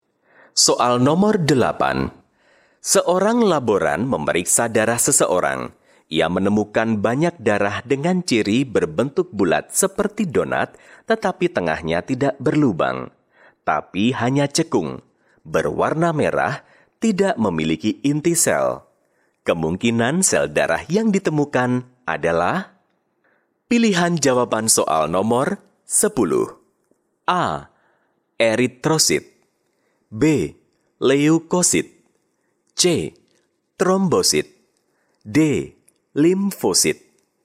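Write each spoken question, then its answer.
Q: Kemungkinan sel darah yang ditemukan adalah?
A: A: Eritrosit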